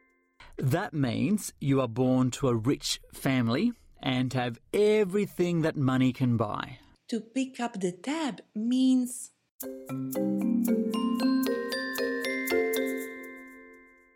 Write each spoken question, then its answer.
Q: To pick up the tab means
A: okay, that means to pay for something, especially something someone else has used or bought.